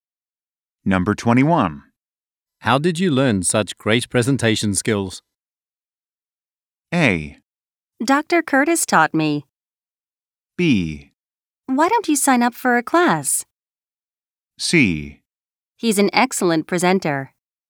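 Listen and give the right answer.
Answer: A: Dr. Curtis taught me.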